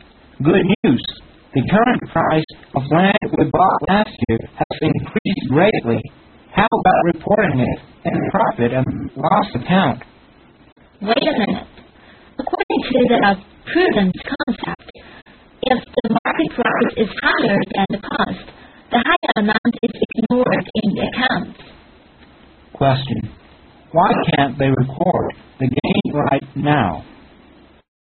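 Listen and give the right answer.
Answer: Because of the prudence concept, gains above cost are ignored in the accounts.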